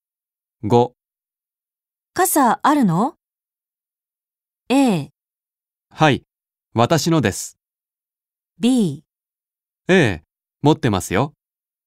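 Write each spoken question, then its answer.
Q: 傘あるの?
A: B: 持ってますよ。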